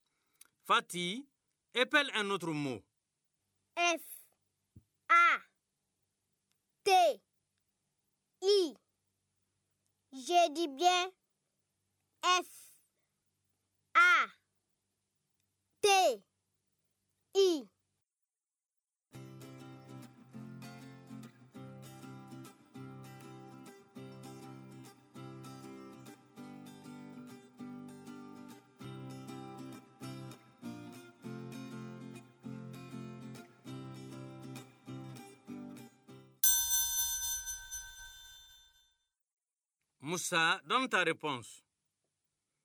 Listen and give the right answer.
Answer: Monsieur, F, A, T, I, c'est Fati.